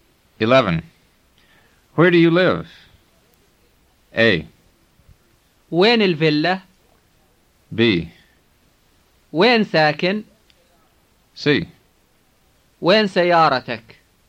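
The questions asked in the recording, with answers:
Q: Where do you live?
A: B: وين ساكن؟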